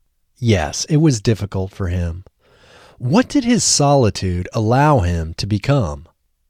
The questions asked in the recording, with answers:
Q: What did his solitude allow him to become?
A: His solitude allowed him to become a keen observer of his peers.